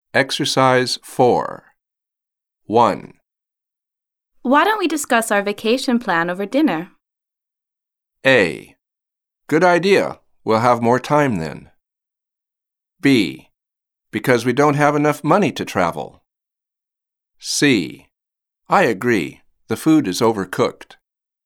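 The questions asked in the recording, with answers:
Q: Why don't we discuss our vacation plan over dinner?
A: A: Good idea. We'll have more time then.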